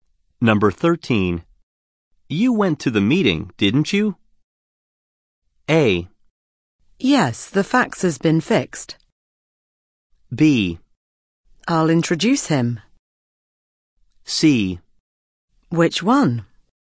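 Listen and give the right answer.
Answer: C: Which one?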